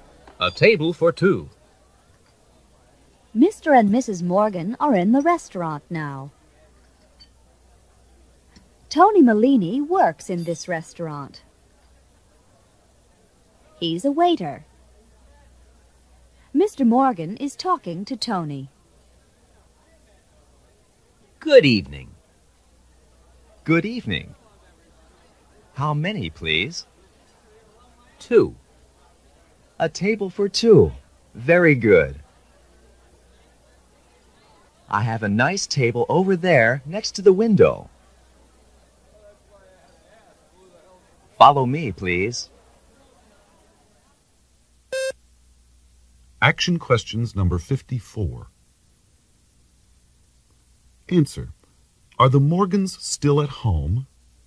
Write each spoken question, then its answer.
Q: Are the Morgans still at home?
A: No, they're not.